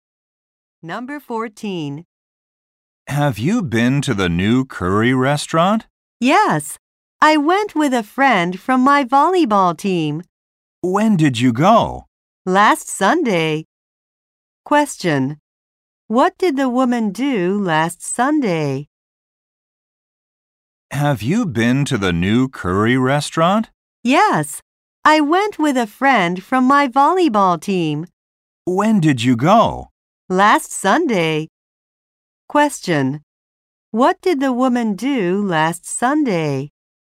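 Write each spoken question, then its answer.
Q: What did the woman do last Sunday?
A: She went to the new curry restaurant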